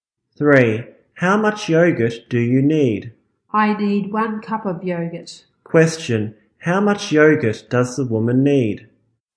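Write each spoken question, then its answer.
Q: How much yogurt does the woman need?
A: 1 cup.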